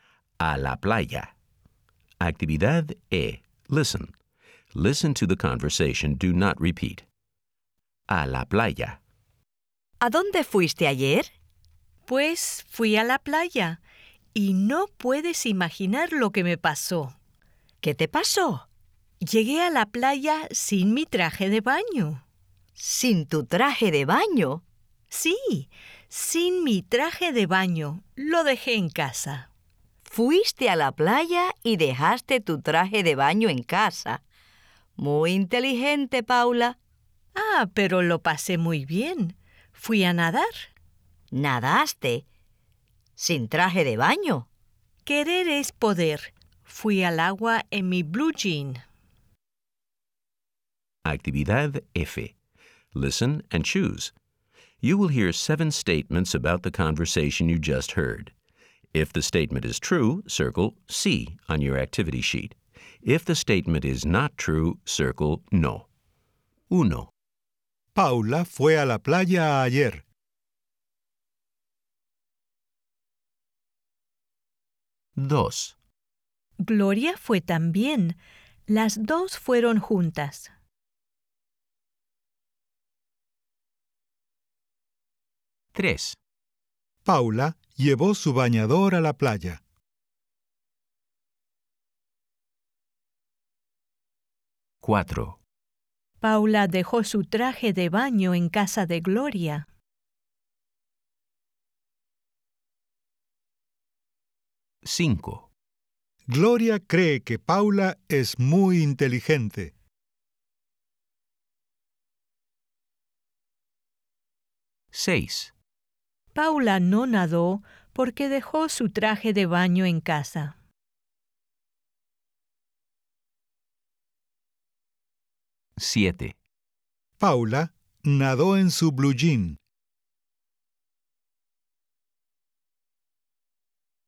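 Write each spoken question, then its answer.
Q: Paula fue a la playa ayer.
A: Sí

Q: Paula llevó su bañador a la playa.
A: No

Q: Paula dejó su traje de baño en casa de Gloria.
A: No

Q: Paula no nadó porque dejó su traje de baño en casa.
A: No

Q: Paula nadó en su blue jean.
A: Sí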